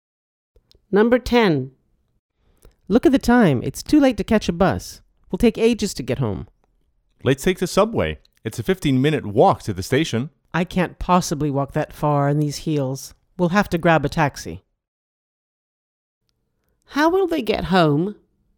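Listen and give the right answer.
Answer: by taxi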